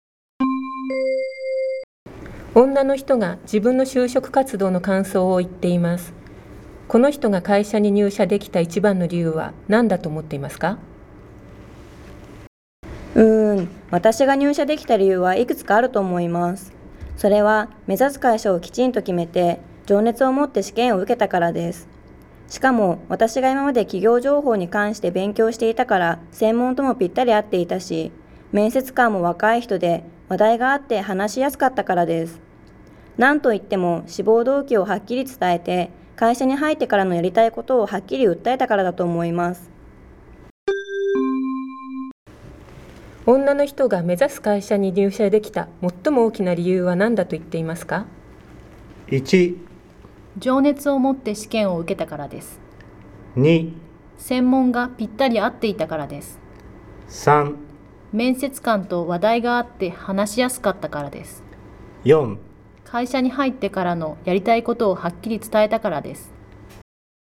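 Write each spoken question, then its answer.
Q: 女の人が目指す会社に入社できた最も大きな理由は何だと言っていますか?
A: 4: 会社に入ってからのやりたいことをはっきり伝えたからです。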